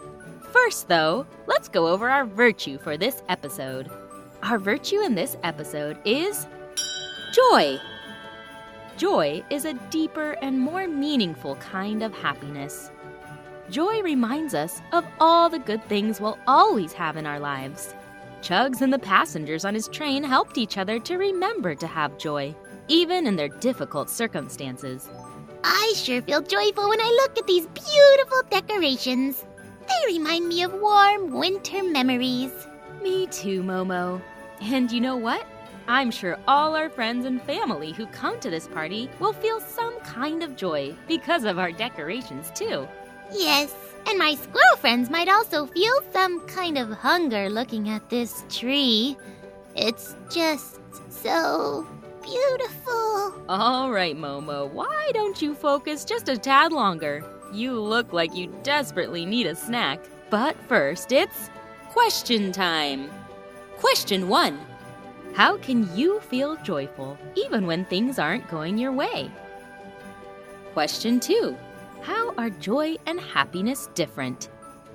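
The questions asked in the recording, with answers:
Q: How are joy and happiness different?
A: Joy is a deeper and more meaningful kind of happiness.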